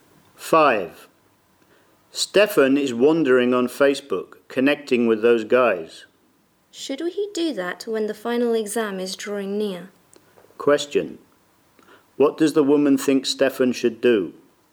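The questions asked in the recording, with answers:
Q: What does the woman think Stefan should do?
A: Prepare for the final exam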